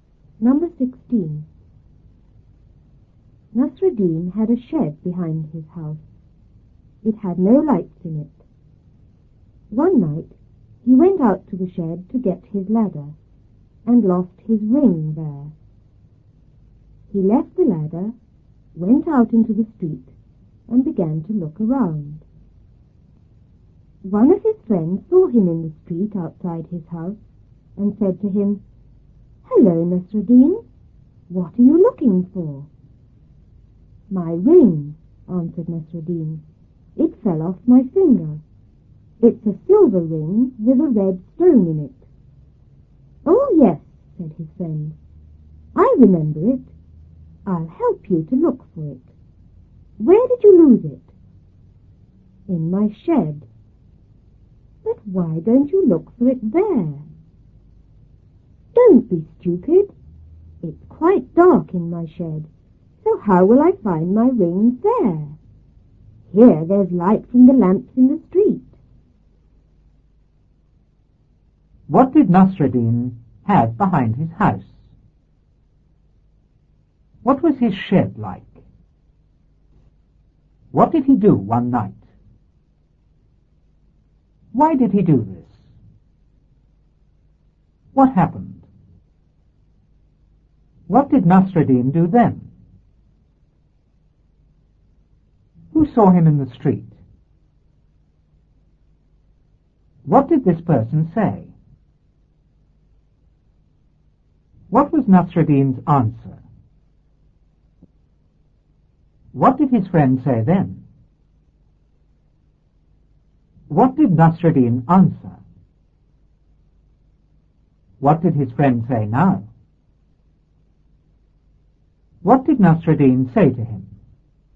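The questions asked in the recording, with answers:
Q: What did Nasruddin have behind his house?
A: A shed

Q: What was his shed like?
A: It had no lights in it

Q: What did he do one night?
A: He went out to the shed

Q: Why did he do this?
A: To get his ladder

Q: What happened?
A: He lost his ring there

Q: What did Nasruddin do then?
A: He left the ladder, went out into the street and began to look around

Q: Who saw him in the street?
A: One of his friends

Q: What did this person say?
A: Hello, Nasruddin, what are you looking for?

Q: What was Nasruddin's answer?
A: My ring; it fell off my finger

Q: What did his friend say then?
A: I remember it. I'll help you look for it. Where did you lose it?

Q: What did Nasruddin answer?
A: In my shed

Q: What did his friend say now?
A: Why don't you look for it there?

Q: What did Nasruddin say to him?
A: It's dark in the shed; there's light from the street lamps here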